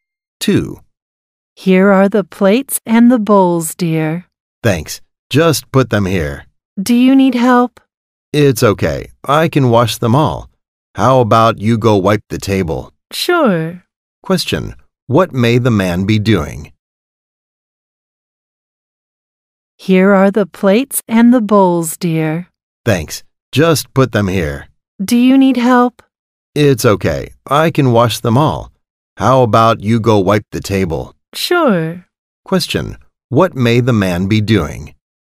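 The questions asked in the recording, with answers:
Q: Question, what may the man be doing?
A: Wiping the table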